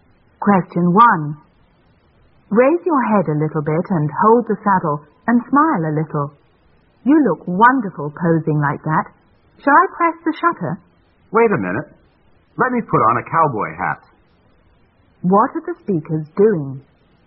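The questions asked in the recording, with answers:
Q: What are the speakers doing?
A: Taking a photo (the man posing on a horse)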